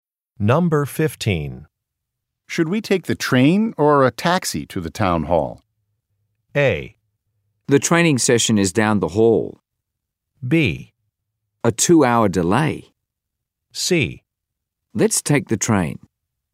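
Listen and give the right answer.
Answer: C: Let's take the train.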